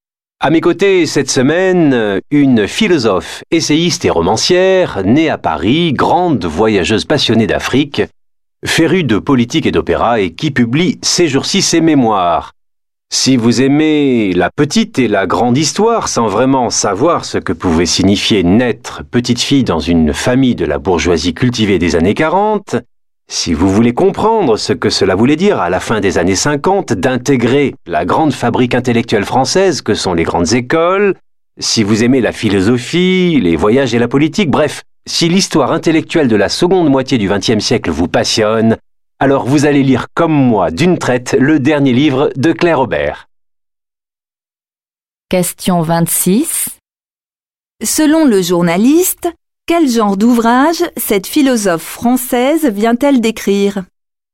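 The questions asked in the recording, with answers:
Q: Selon le journaliste, quel genre d'ouvrage cette philosophe française vient-elle d'écrire?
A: Ses mémoires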